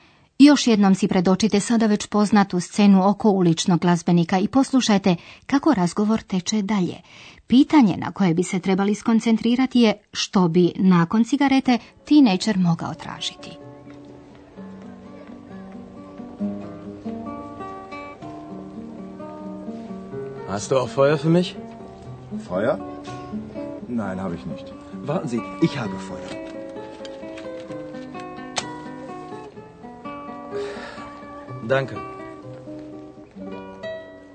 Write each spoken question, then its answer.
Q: što bi nakon cigarete teenager mogao tražiti.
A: Potrebna mu je vatra.